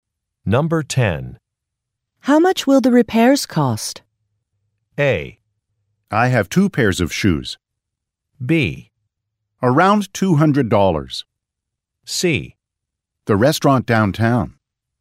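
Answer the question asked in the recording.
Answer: B: Around $200.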